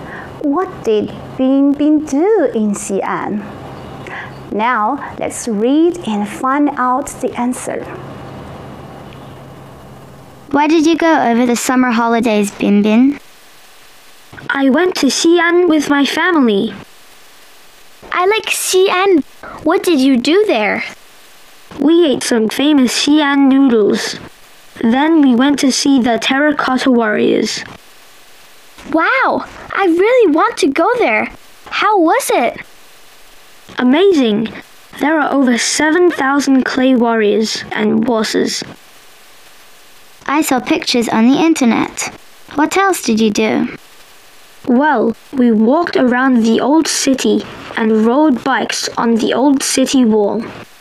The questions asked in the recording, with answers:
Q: What did Bing Bing do in Xi'an?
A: So he ate Xi'an noodles, went to see the Terracotta Warriors, walked around the old city and rode bikes on the old city wall.